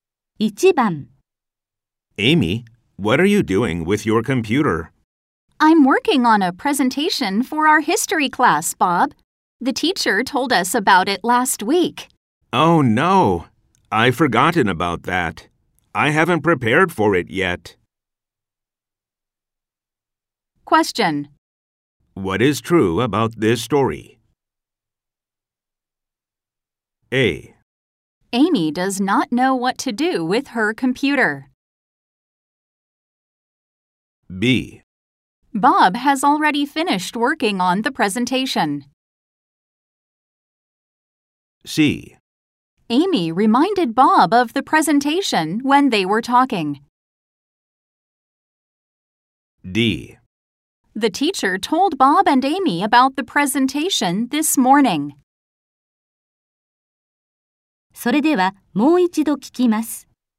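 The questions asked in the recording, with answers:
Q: What is true about this story?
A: C: Amy reminded Bob of the presentation when they were talking.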